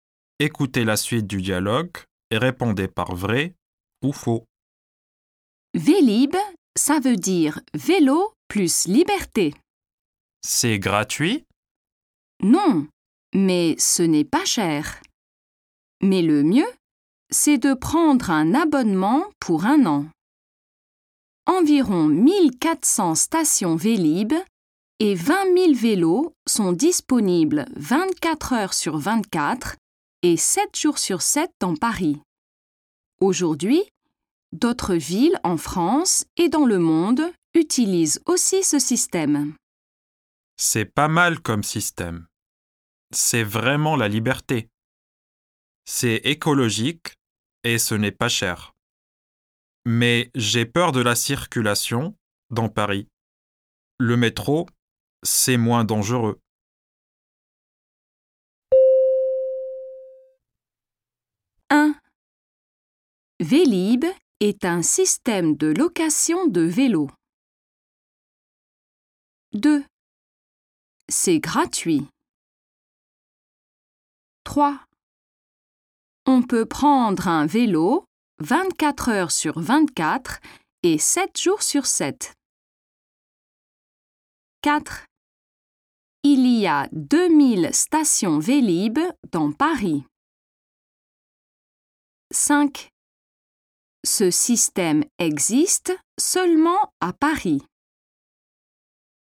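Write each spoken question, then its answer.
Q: Vélib est un système de location de vélos.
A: Vrai

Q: C'est gratuit.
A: Faux

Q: On peut prendre un vélo 24 heures sur 24 et 7 jours sur 7.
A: Vrai

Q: Il y a 2000 stations Vélib dans Paris.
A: Faux

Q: Ce système existe seulement à Paris.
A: Faux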